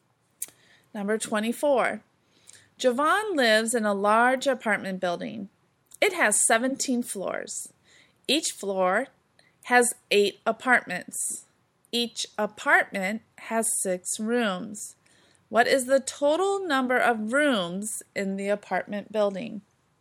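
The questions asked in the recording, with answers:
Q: What is the total number of rooms in the apartment building?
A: 816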